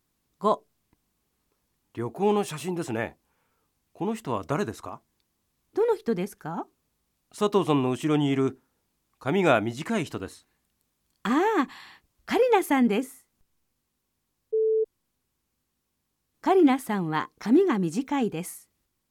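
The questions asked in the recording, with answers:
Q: カリナさんは髪が短いです。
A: ○(正しい)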